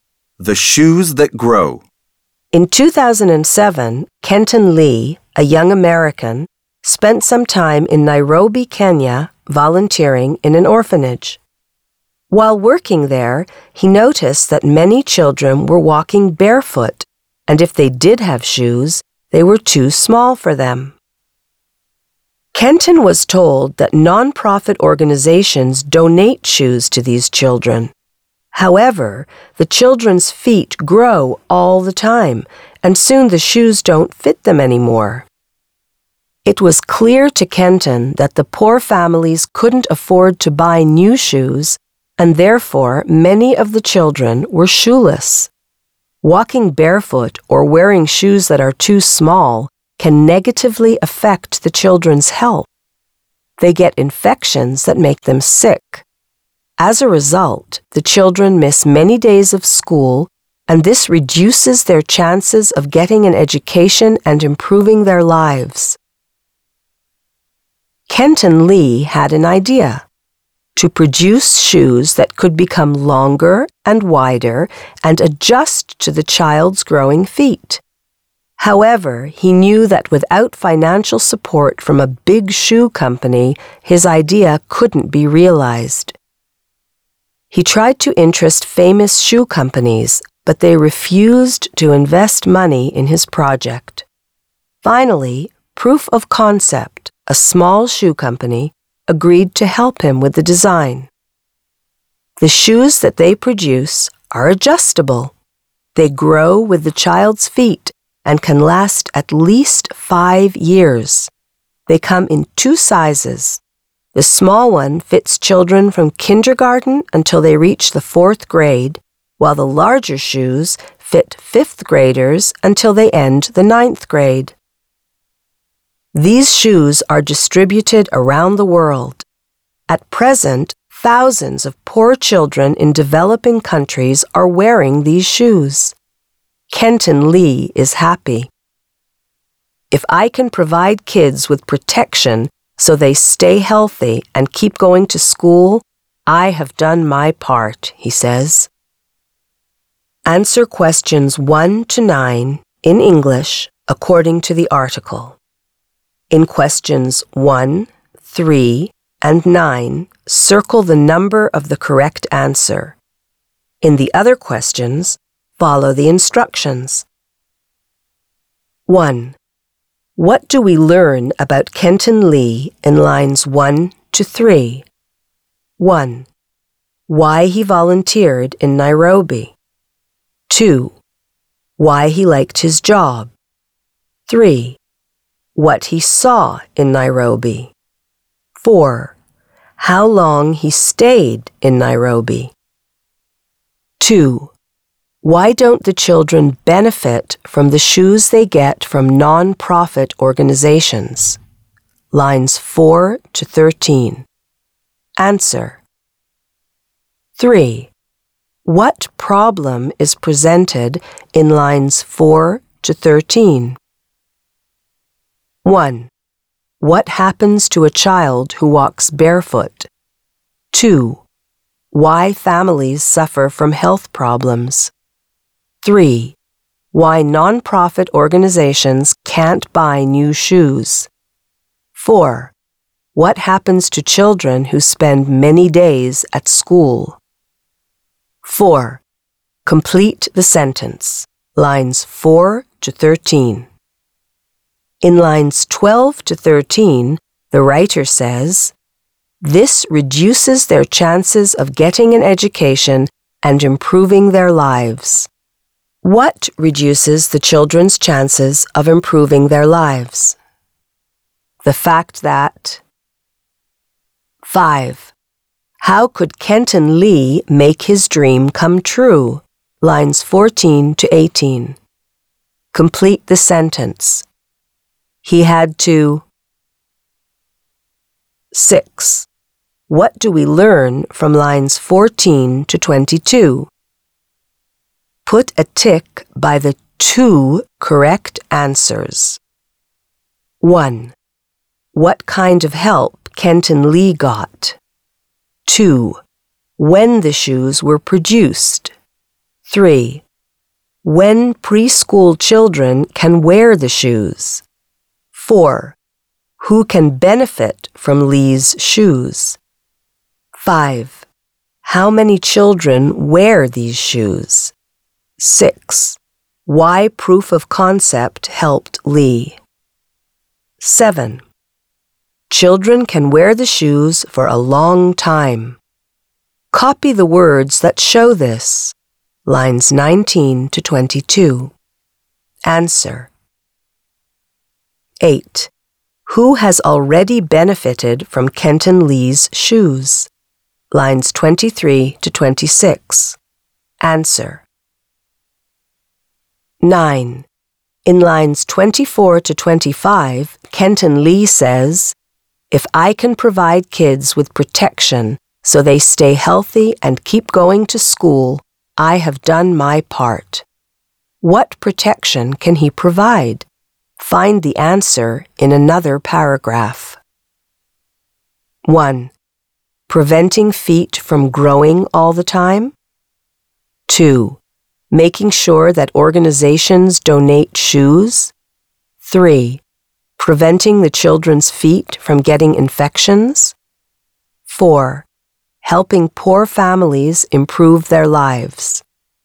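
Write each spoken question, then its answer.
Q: What do we learn about Kenton Lee in lines 1 to 3?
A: 3: What he saw in Nairobi.

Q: Why don't the children benefit from the shoes they get from non-profit organizations?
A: Their feet grow all the time and soon the shoes don't fit anymore.

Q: What problem is presented in lines 4 to 13?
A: 1: What happens to a child who walks barefoot?

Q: What reduces the children's chances of improving their lives?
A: The fact that they miss many days of school.

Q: How could Kenton Lee make his dream come true?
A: He had to get financial support from a shoe company.

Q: Children can wear the shoes for a long time.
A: can last at least 5 years

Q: Who has already benefited from Kenton Lee's shoes?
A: Thousands of poor children in developing countries.

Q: What protection can he provide?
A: 3: Preventing the children's feet from getting infections.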